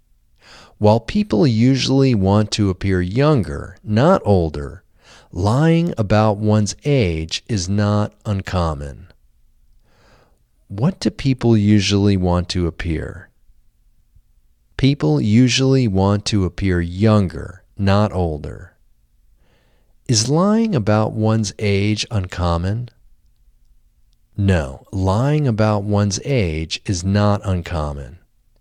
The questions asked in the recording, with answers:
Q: What do people usually want to appear?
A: People usually want to appear younger, not older.